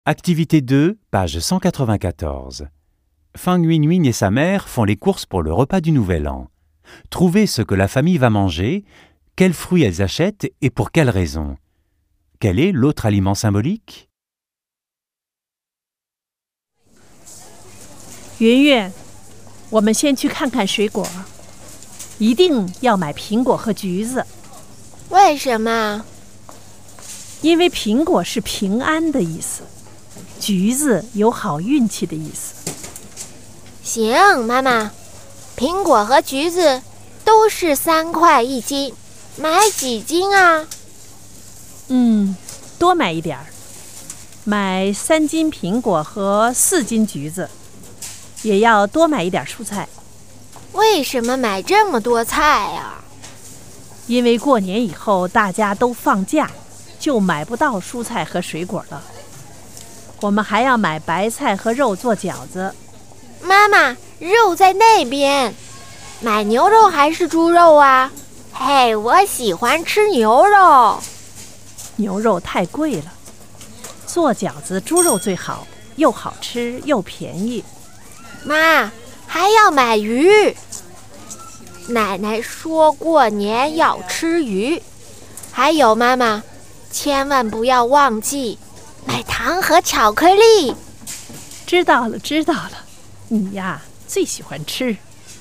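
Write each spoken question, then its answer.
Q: Trouver ce que la famille va manger, quels fruits elles achètent et pour quelles raisons.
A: Des raviolis (jiaozi) au porc et au chou chinois, du poisson. Des pommes (symbole de paix) et des mandarines (symbole de chance)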